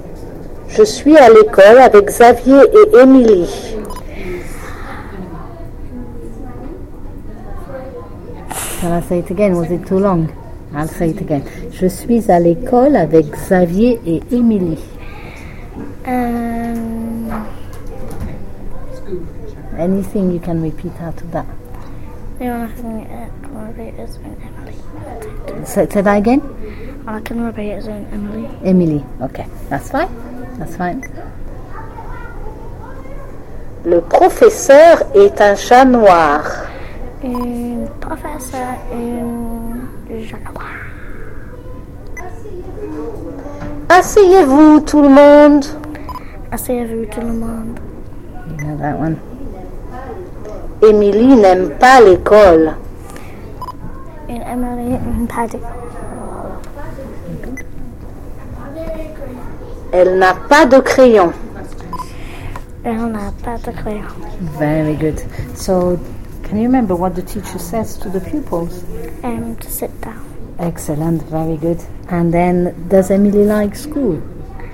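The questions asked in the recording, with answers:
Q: So, can you remember what the teacher says to the pupils?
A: Sit down, everyone

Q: And then, does Emily like school?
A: No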